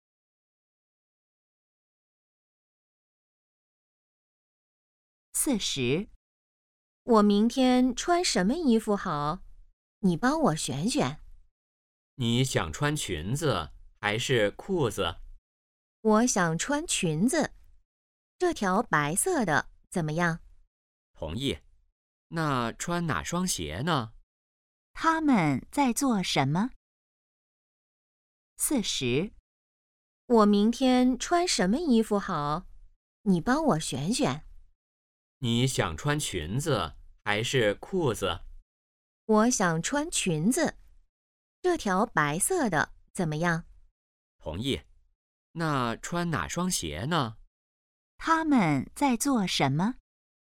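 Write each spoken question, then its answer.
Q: 他们在做什么?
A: 选衣服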